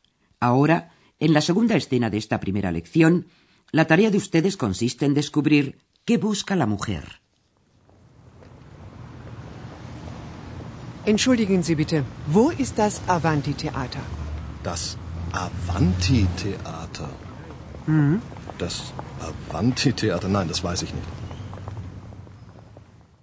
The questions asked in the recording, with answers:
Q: la tarea de ustedes consiste en descubrir qué busca la mujer.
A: la mujer estaba buscando un teatro, theater, un teatro determinado